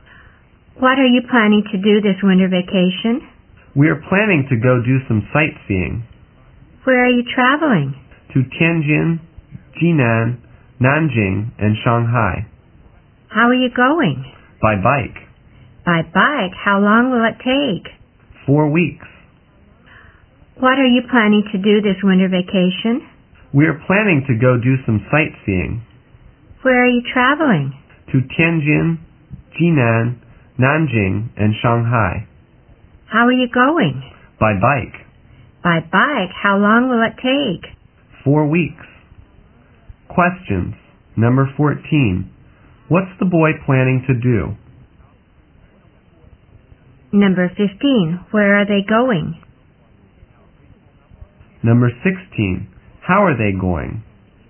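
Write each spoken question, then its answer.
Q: What's the boy planning to do?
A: Go sightseeing

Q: Where are they going?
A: Tianjin, Jinan, Nanjing and Shanghai

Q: How are they going?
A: By bike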